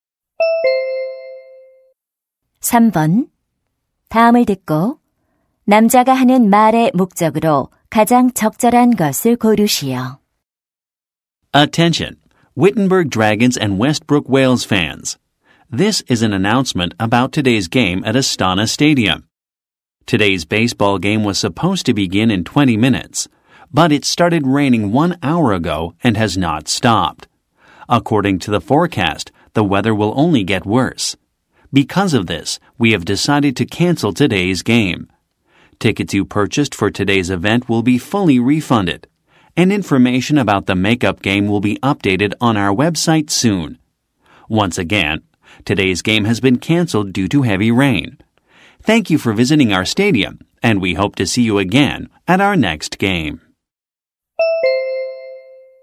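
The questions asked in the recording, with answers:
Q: 다음을 듣고 남자가 하는 말의 목적으로 가장 적절한 것을 고르시오.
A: 비로 인한 오늘 야구 경기 취소를 알리려고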